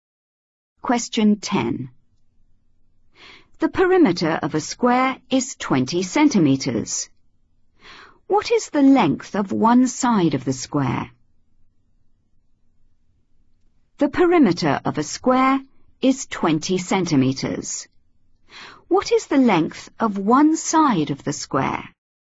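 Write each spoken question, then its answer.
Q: What is the length of one side of the square?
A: 5 cm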